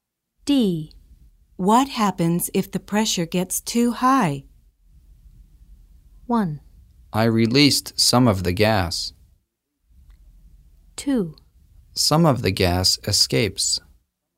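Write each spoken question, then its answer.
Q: What happens if the pressure gets too high?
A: 2: Some of the gas escapes.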